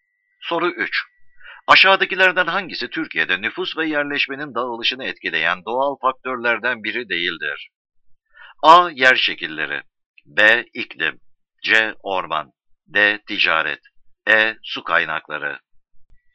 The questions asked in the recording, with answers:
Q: Aşağıdakilerden hangisi Türkiye'de nüfus ve yerleşmenin dağılışını etkileyen doğal faktörlerden biri değildir?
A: Doğru cevap D.